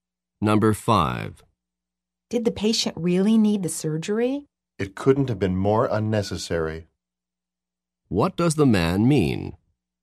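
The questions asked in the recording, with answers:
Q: What does the man mean?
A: The surgery was completely unnecessary.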